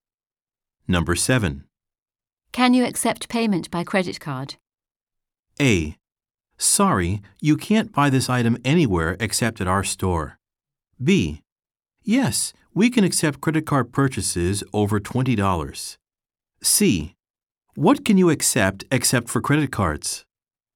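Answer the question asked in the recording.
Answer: B: Yes, we can accept credit card purchases over $20.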